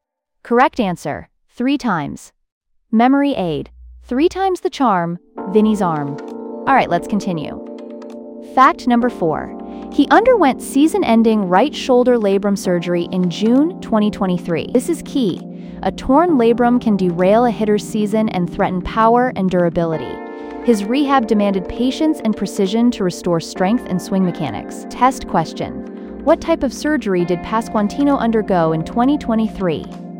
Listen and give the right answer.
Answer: Right shoulder labrum surgery.